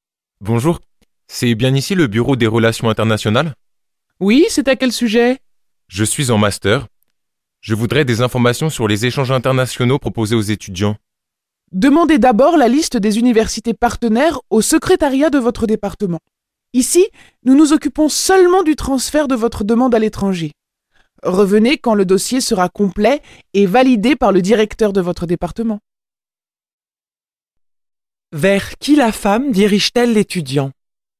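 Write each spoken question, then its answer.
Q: Vers qui la femme dirige-t-elle l'étudiant?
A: Vers le secrétariat de son département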